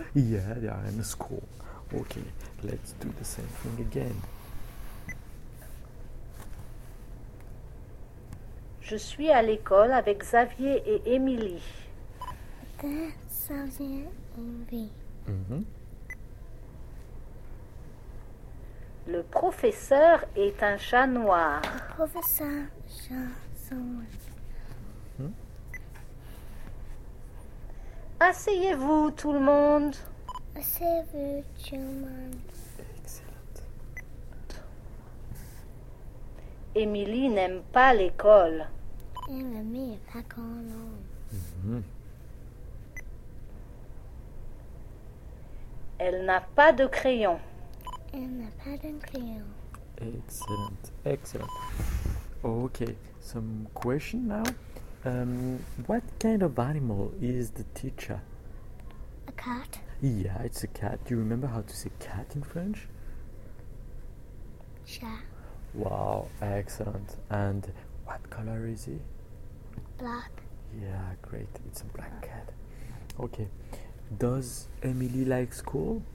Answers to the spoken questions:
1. Yeah, it's a cat.
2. It's a black cat.
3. No, she doesn't like school.